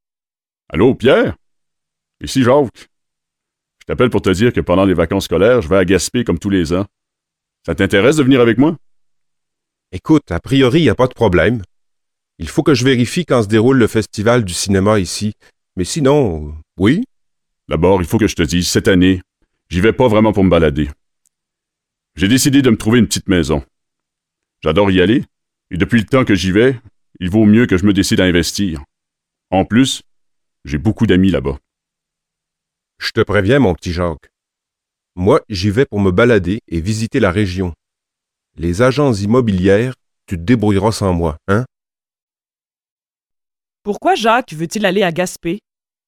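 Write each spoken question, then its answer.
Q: Pourquoi Jacques veut-il aller à Gaspé?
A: Pour s'acheter une petite maison (investir)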